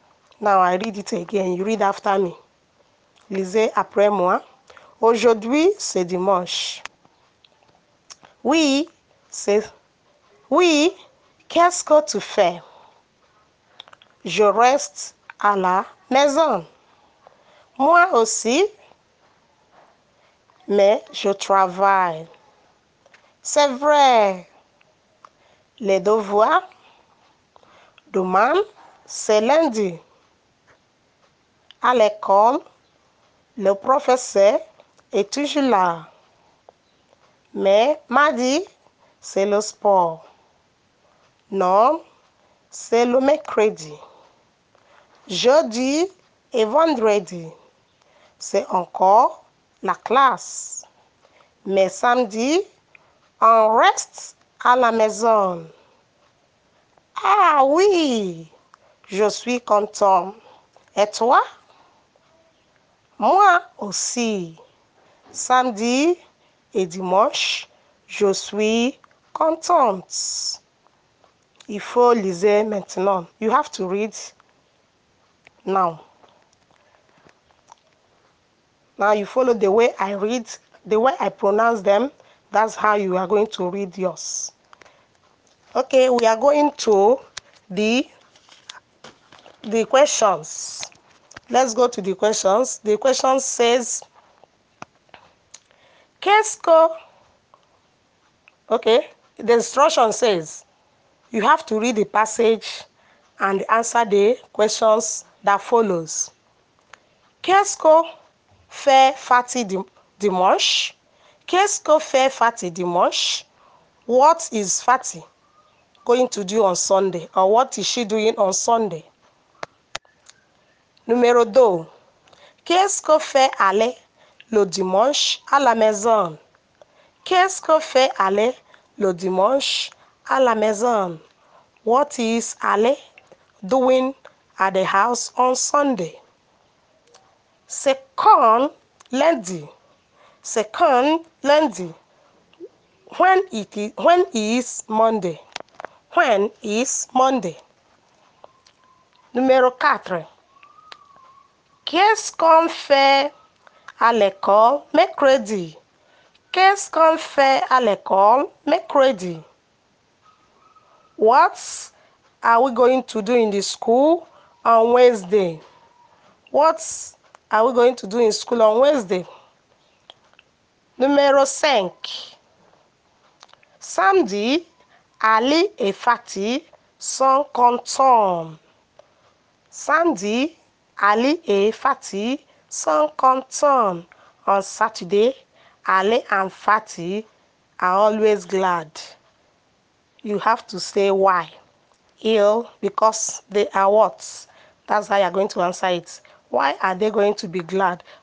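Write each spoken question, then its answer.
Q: Qu'est-ce qu'on fait à l'école mercredi?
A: Le sport.

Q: Samedi, Ali et Fatty sont contents.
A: Parce qu'ils restent à la maison.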